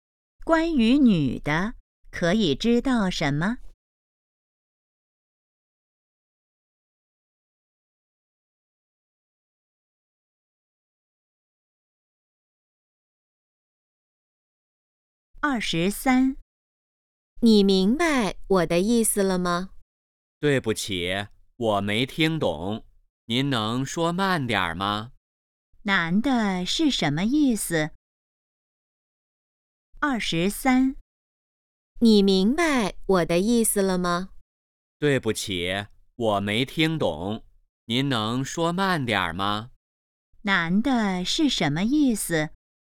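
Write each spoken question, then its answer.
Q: 男的是什么意思?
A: 没听懂,希望对方说慢点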